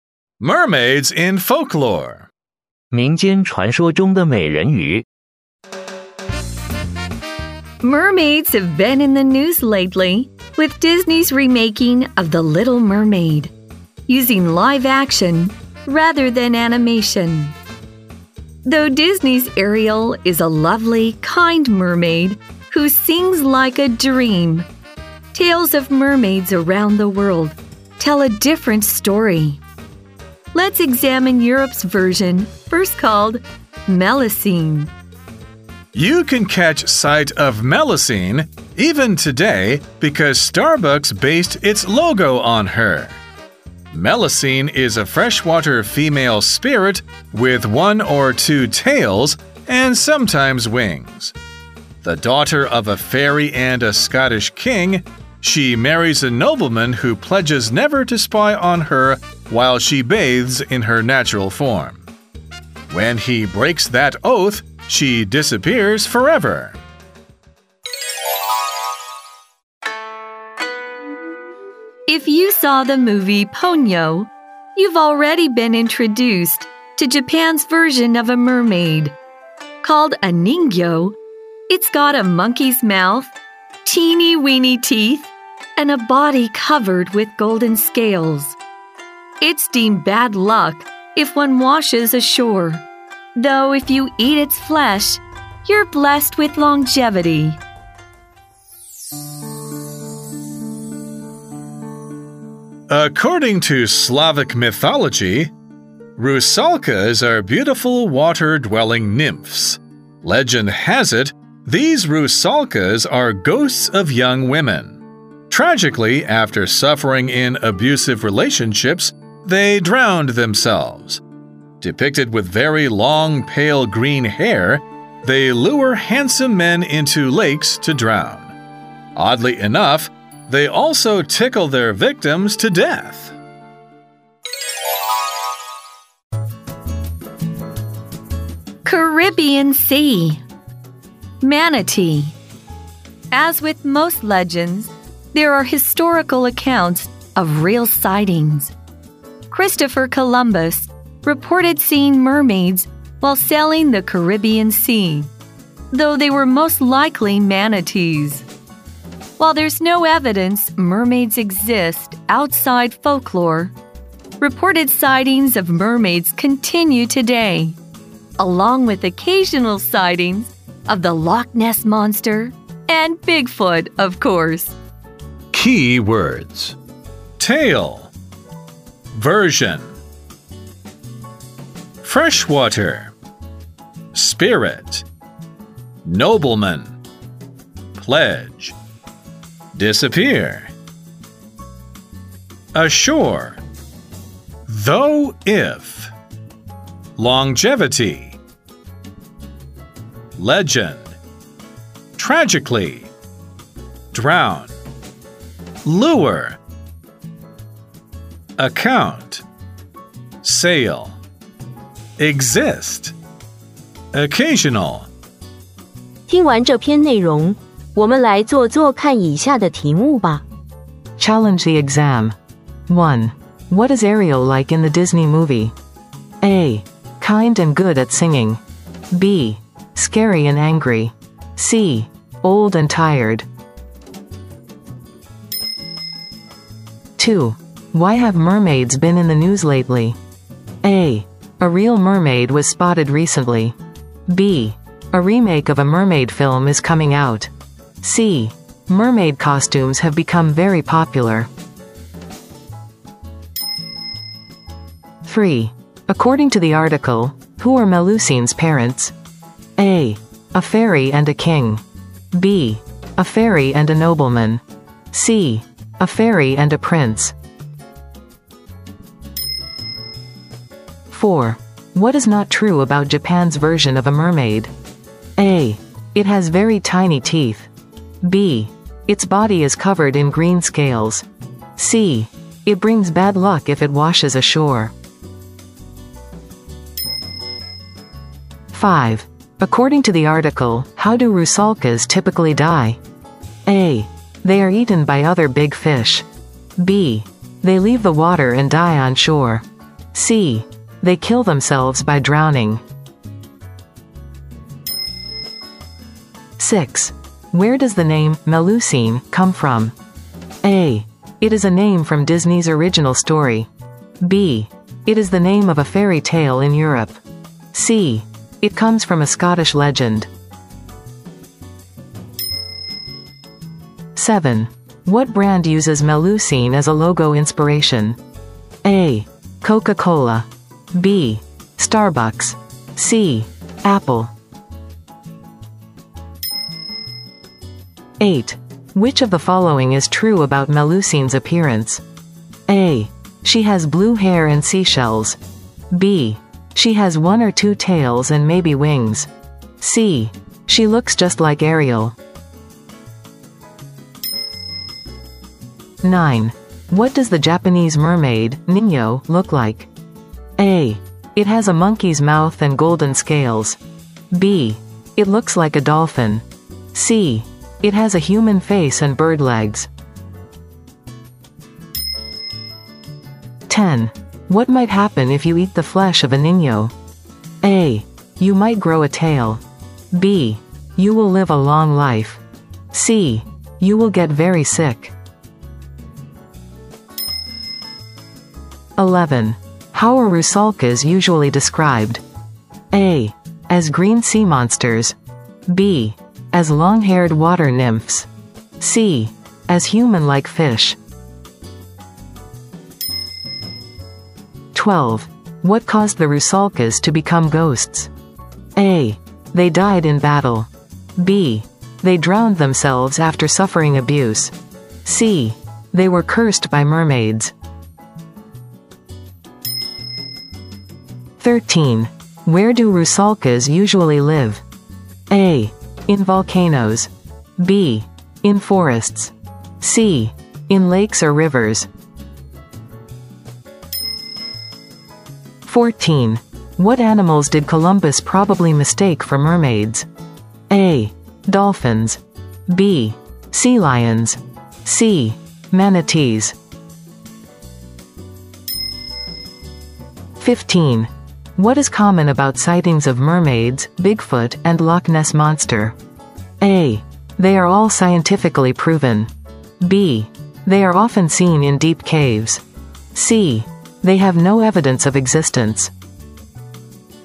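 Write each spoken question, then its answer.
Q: What is Ariel like in the Disney movie?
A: A: Kind and good at singing.

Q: Why have mermaids been in the news lately?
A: B: A remake of a mermaid film is coming out.

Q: According to the article, who are Melusine's parents?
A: A: A fairy and a king.

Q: What is not true about Japan's version of a mermaid?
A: B: Its body is covered in green scales.

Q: According to the article, how do Rusalkas typically die?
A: C: They kill themselves by drowning.

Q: What brand uses Melusine as a logo inspiration?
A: B: Starbucks.

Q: Which of the following is true about Melusine's appearance?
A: B: She has one or two tails and maybe wings.

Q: What does the Japanese mermaid, Ninyo, look like?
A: A: It has a monkey's mouth and golden scales.

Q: What might happen if you eat the flesh of a Ninyo?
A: B: You will live a long life.

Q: How are Rusalkas usually described?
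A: B: As long-haired water nymphs.

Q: What caused the Rusalkas to become ghosts?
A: B: They drowned themselves after suffering abuse.

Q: Where do Rusalkas usually live?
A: C: In lakes or rivers.

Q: What animals did Columbus probably mistake for mermaids?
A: C: Manatees.

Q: What is common about sightings of mermaids, Bigfoot, and Loch Ness Monster?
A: C: They have no evidence of existence.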